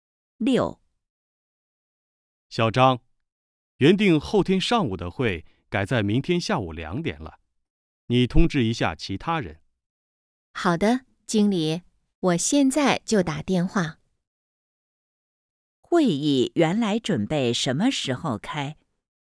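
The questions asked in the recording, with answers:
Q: 会议原来准备什么时候开?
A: 后天上午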